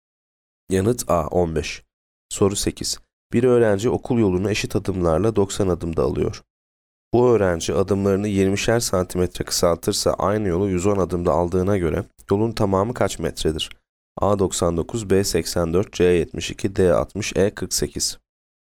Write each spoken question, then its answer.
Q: Bu öğrenci adımlarını 20'şer santimetre kısaltırsa aynı yolu 110 adımda aldığına göre yolun tamamı kaç metredir?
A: Yanıt A 99.